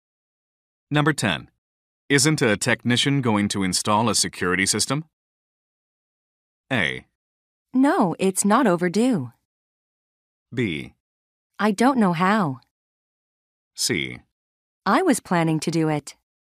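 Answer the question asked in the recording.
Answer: C: I was planning to do it.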